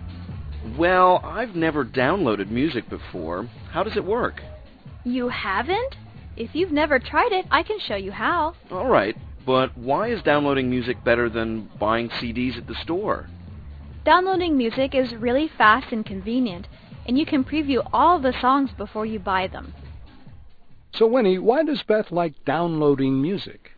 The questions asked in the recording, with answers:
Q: So Winnie, why does Beth like downloading music?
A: 她说啊,从网上下载歌曲又快又方便,还可以在购买前 preview 试听一下。